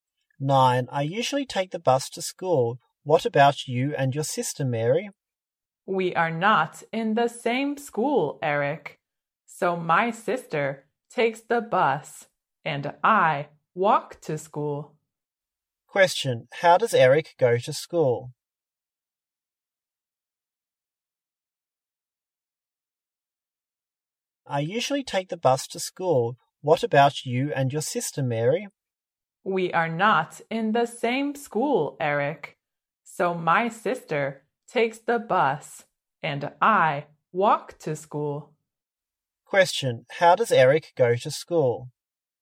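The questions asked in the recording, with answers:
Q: How does Eric go to school?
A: By bus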